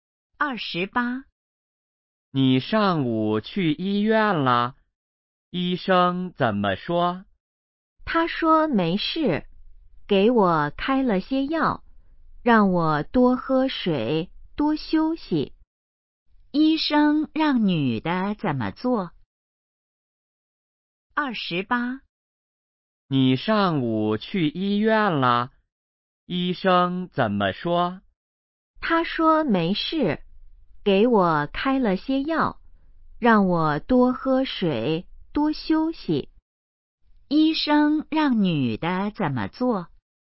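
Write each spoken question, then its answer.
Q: 医生让女的怎么做?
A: 吃药,多喝水,多休息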